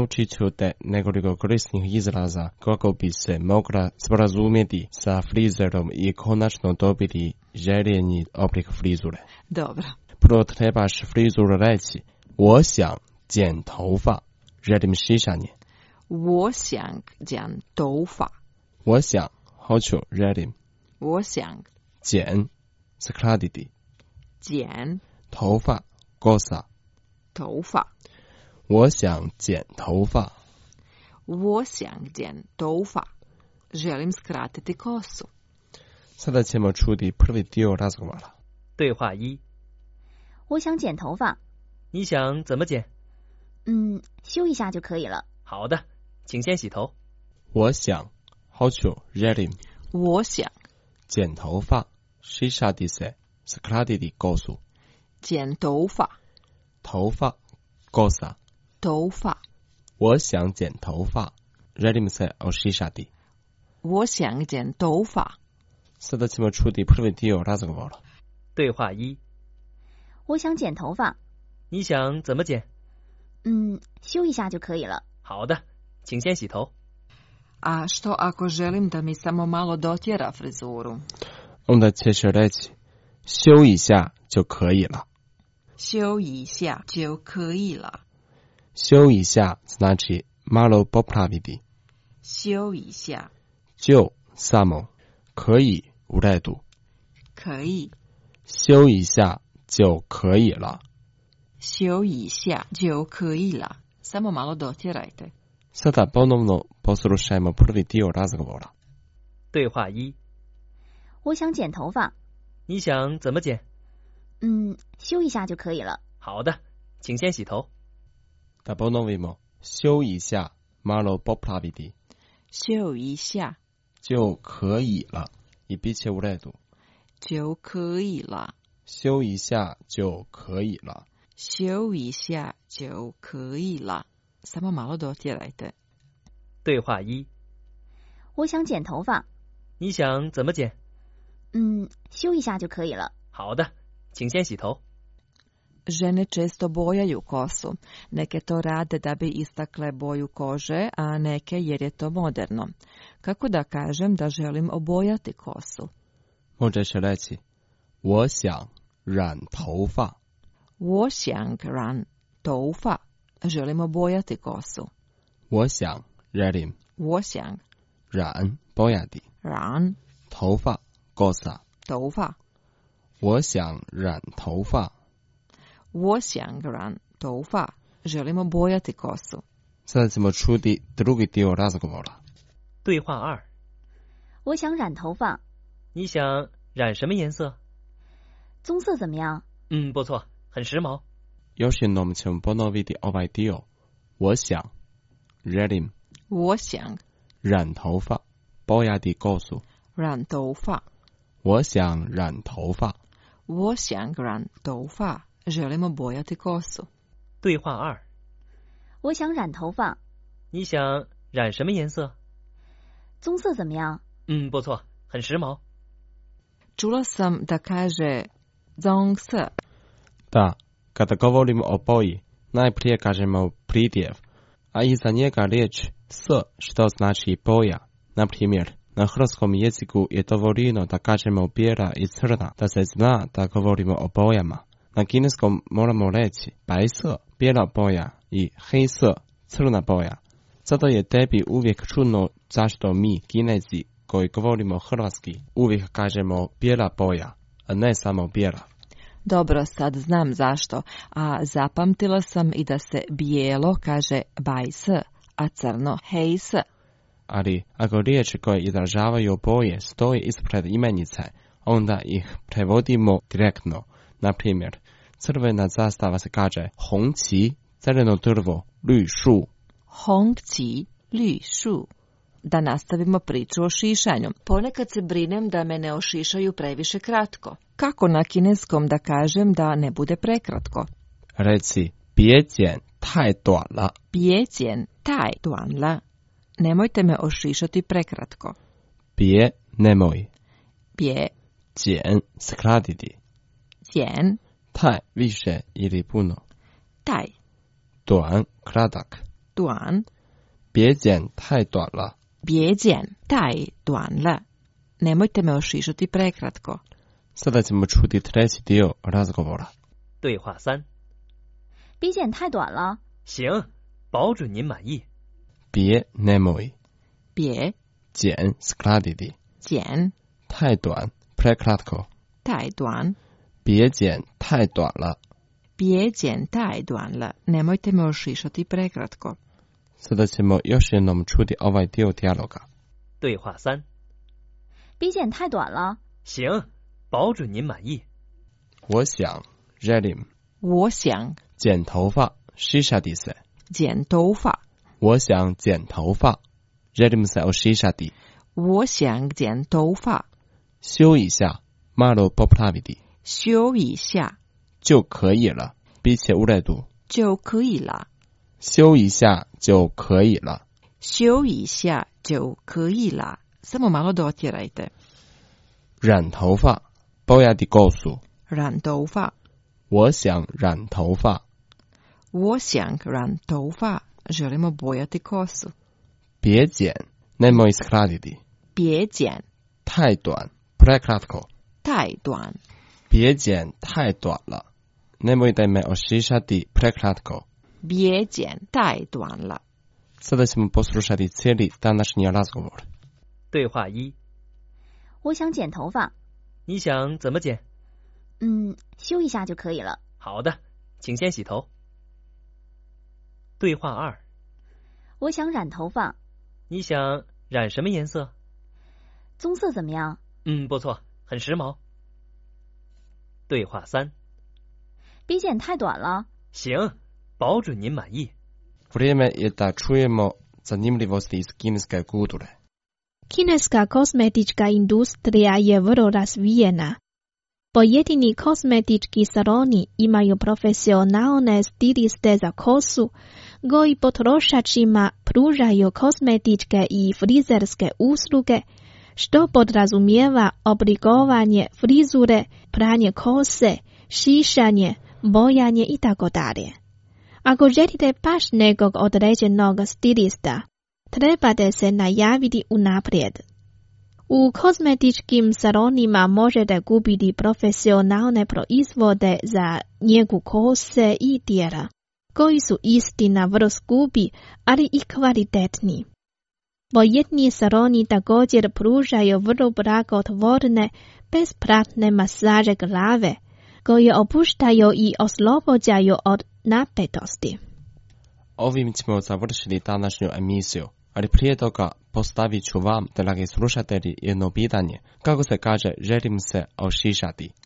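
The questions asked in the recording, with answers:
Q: Kako se kaže, želim se ošišati?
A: 我想剪头发 (Wo xiang jian toufa)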